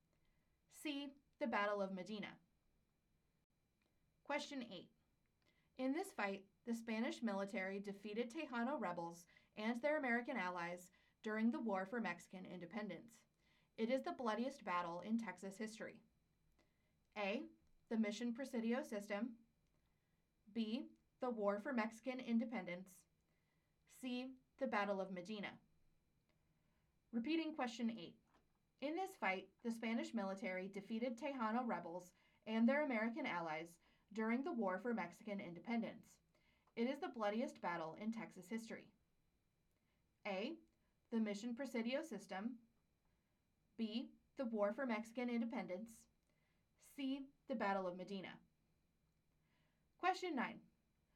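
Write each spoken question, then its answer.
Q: In this fight, the Spanish military defeated Tejano rebels and their American allies during the War for Mexican Independence.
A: C: The Battle of Medina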